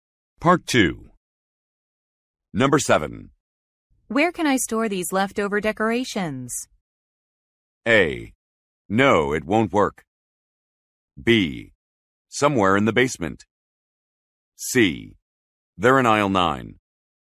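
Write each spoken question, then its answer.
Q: Where can I store these leftover decorations?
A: B: Somewhere in the basement.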